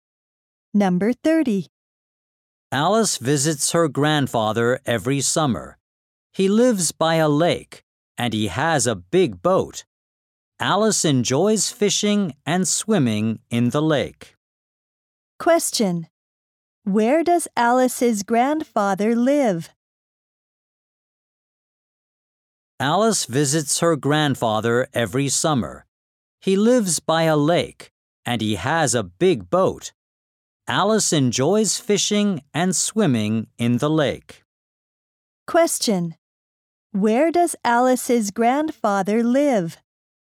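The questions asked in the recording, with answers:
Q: Where does Alice's grandfather live?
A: By a lake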